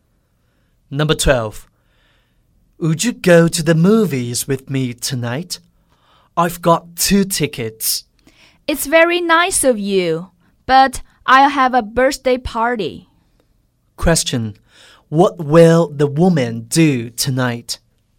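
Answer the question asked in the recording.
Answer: Have a birthday party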